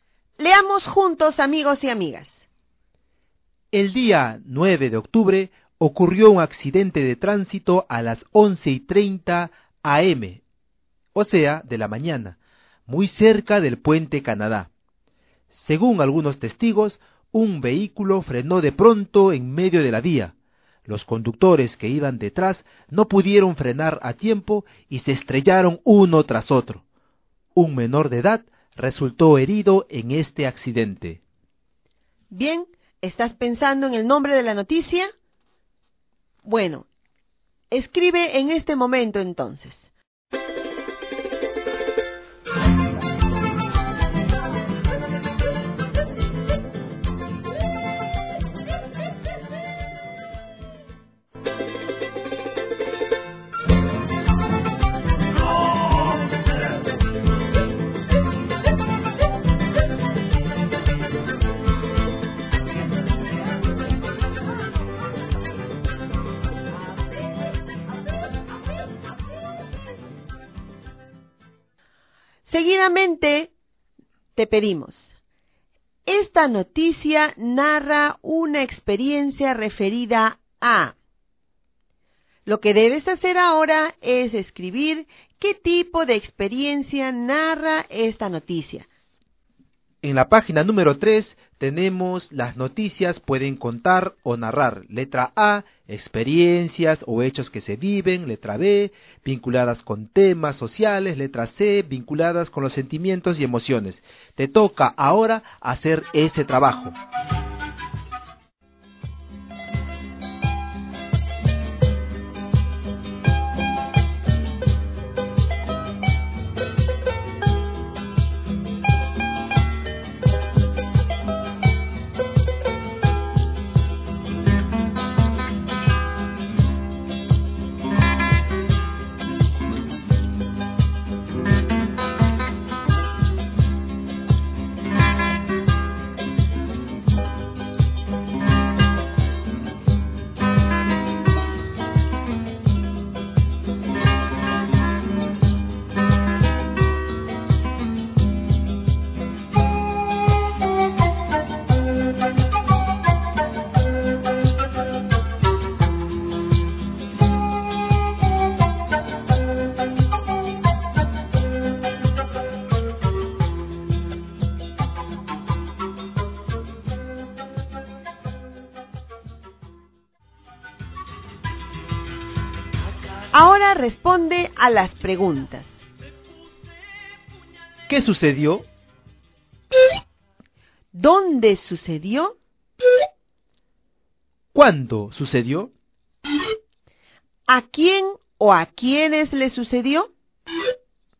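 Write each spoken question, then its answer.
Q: ¿Qué sucedió?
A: Ocurrió un accidente de tránsito.

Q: ¿Dónde sucedió?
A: Muy cerca del puente Canadá.

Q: ¿Cuándo sucedió?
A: El 9 de octubre a las 11:30 de la mañana.

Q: ¿A quién o a quiénes le sucedió?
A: A los conductores; un menor de edad resultó herido.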